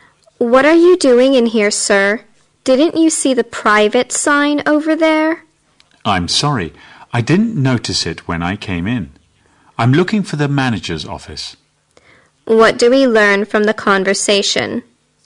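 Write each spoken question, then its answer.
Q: What do we learn from the conversation?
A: The man went into a private area by mistake while looking for the manager's office.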